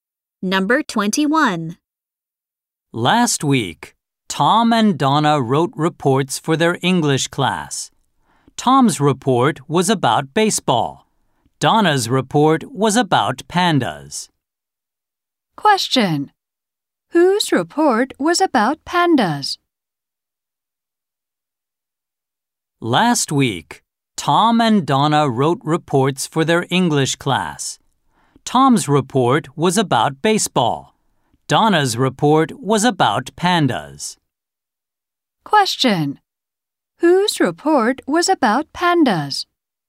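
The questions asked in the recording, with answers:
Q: Whose report was about pandas?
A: Donna's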